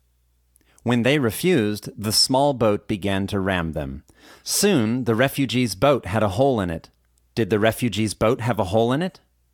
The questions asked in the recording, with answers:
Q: Did the refugees' boat have a hole in it?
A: Yes, the refugees' boat had a hole in it.